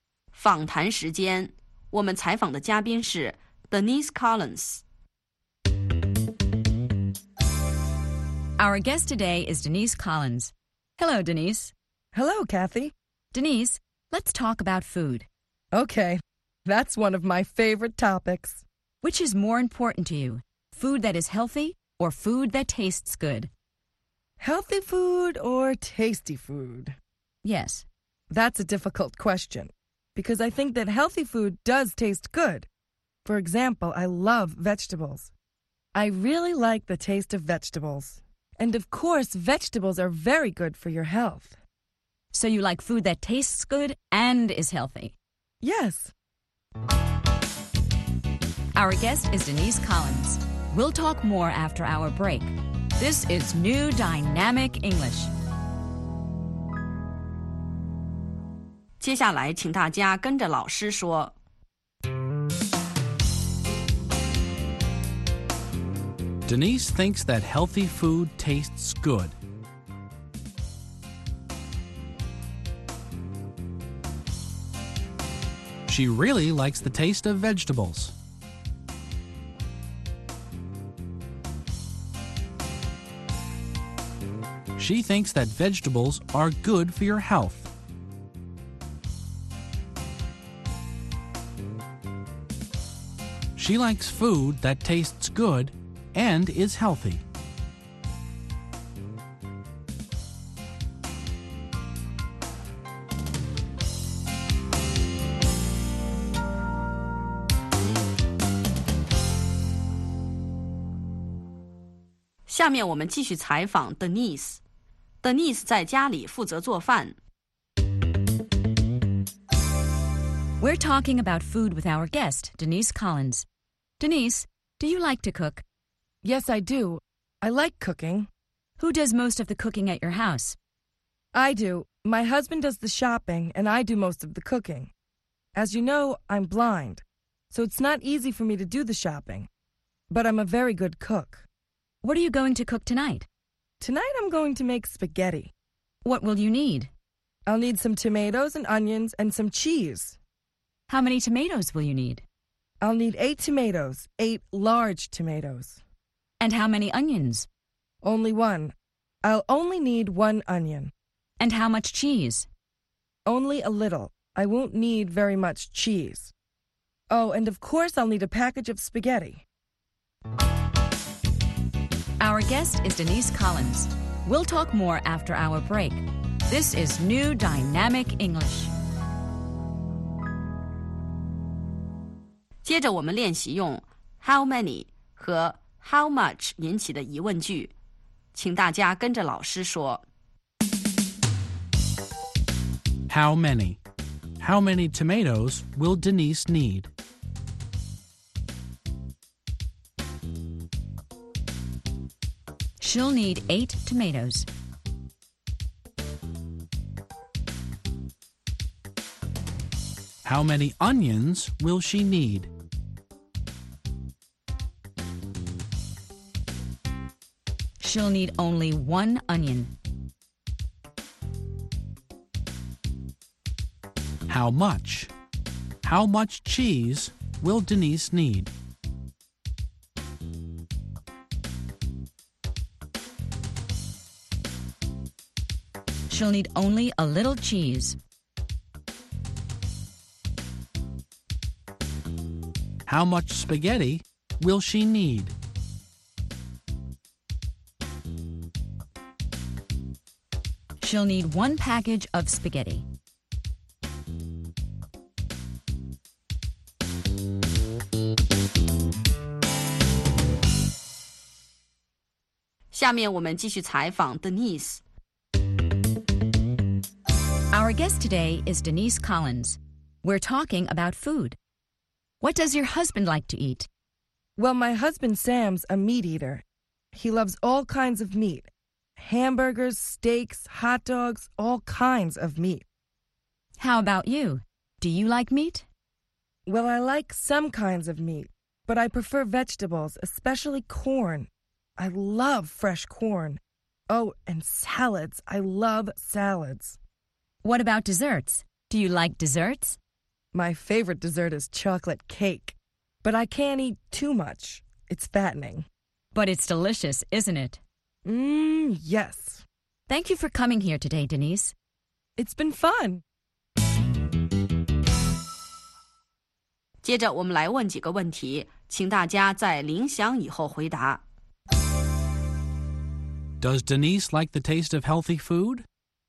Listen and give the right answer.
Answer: Yes, she does. She thinks that healthy food tastes good.